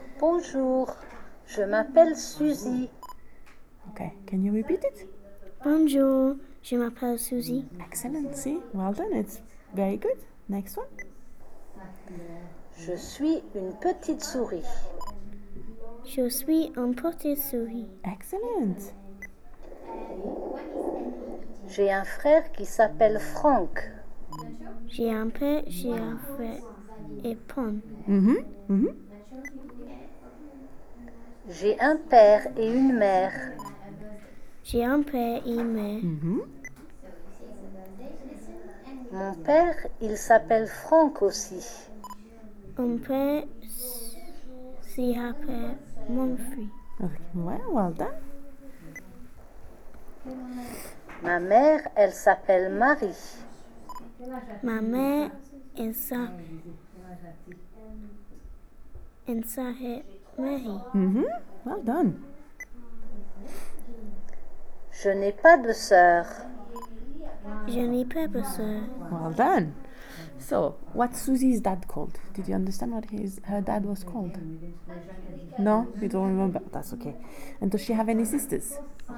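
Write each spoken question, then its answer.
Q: So, what's Susie's dad called?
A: Franck

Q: And does she have any sisters?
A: No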